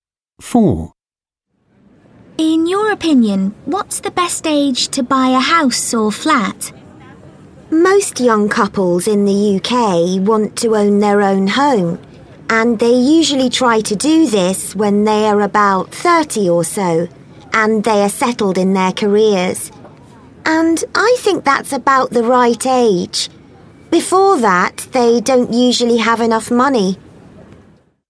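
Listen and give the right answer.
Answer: About 30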